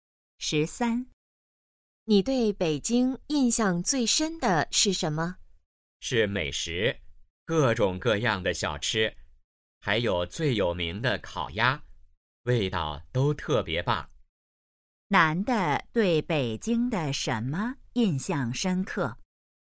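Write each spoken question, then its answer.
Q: 男的对北京的什么印象深刻?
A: 美食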